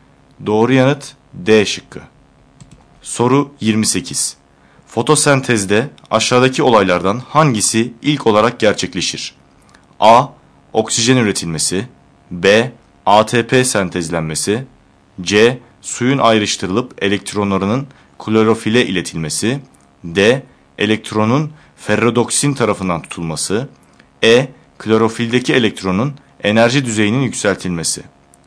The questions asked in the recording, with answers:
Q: Fotosentezde aşağıdaki olaylardan hangisi ilk olarak gerçekleşir?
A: Doğru yanıt E şıkkı.